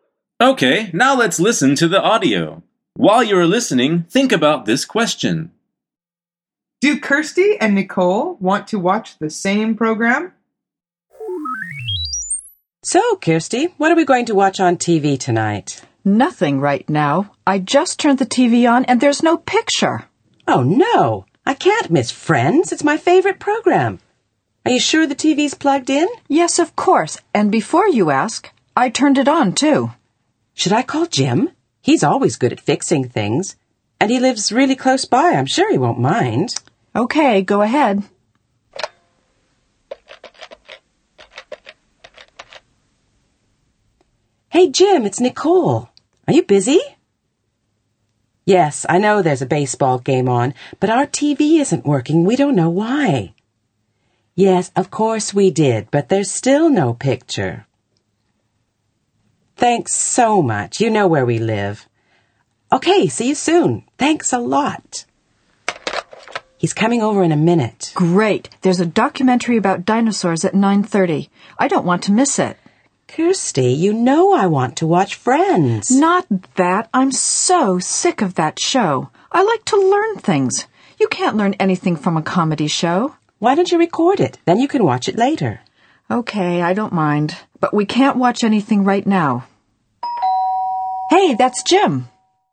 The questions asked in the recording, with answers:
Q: Do Kirsty and Nicole want to watch the same program?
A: The answer is no.